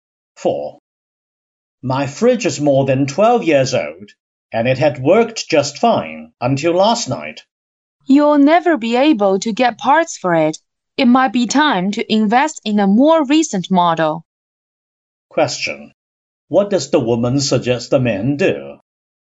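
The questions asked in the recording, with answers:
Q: What does the woman suggest the men do?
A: Buy a new fridge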